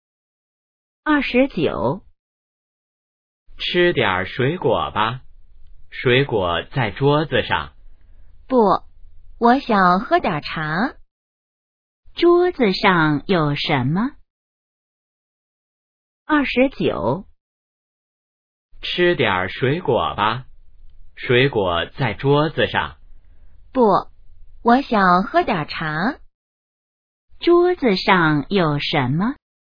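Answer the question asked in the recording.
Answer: 水果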